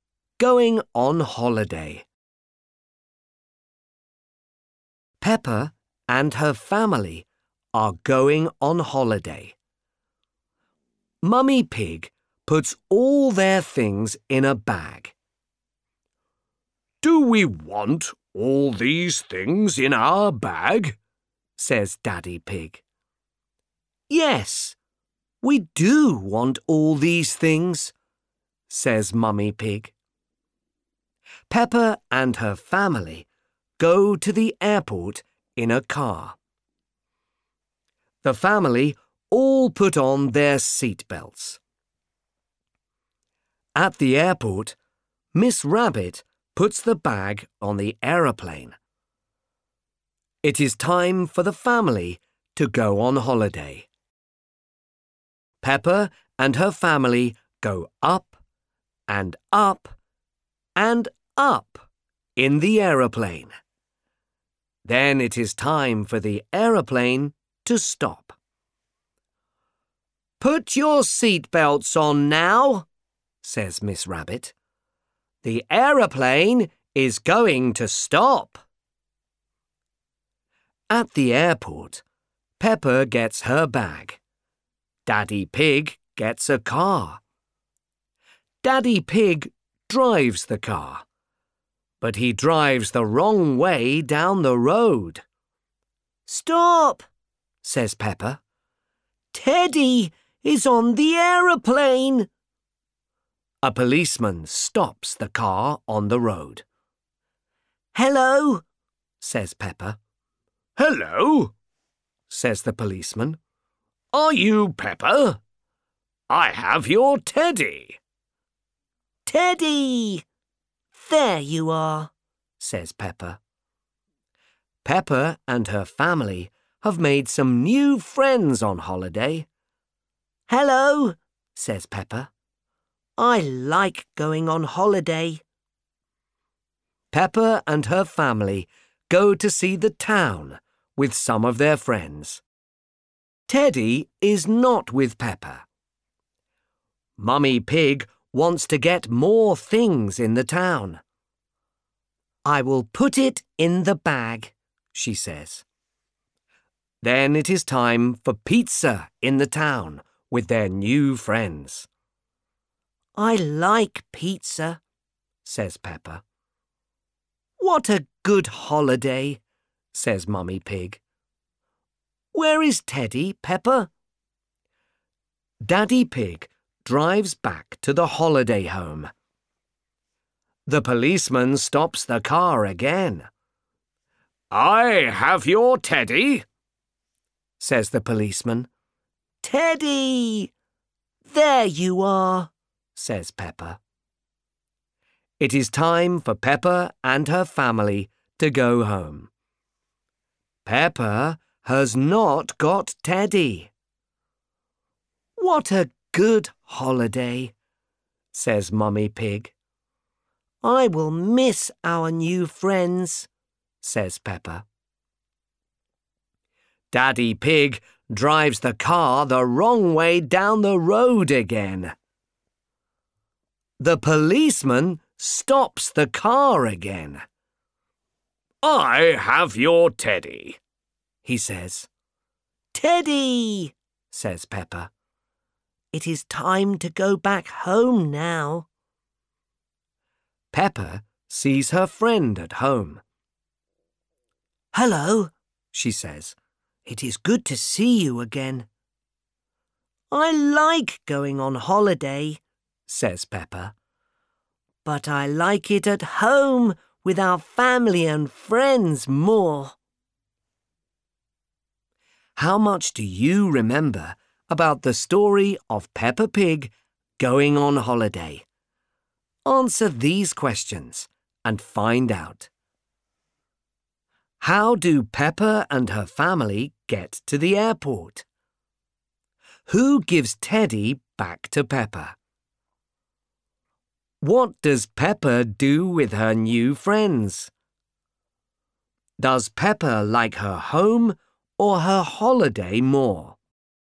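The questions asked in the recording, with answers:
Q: How do Peppa and her family get to the airport?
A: In a car

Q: Who gives Teddy back to Peppa?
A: A policeman

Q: What does Peppa do with her new friends?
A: She goes to see the town and has pizza with them

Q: Does Peppa like her home or her holiday more?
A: Her home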